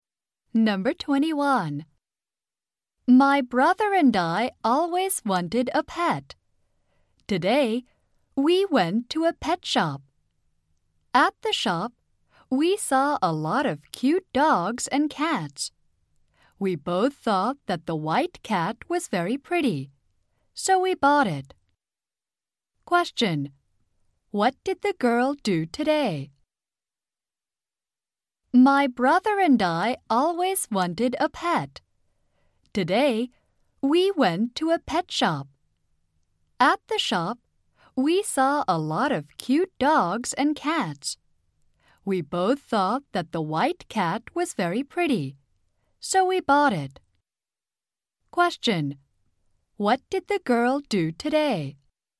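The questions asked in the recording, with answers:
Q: What did the girl do today?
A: She went to a pet shop and bought a white cat.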